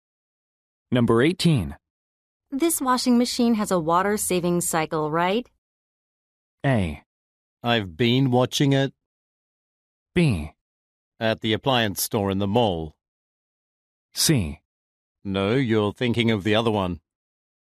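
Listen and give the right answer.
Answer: C: No, you're thinking of the other one.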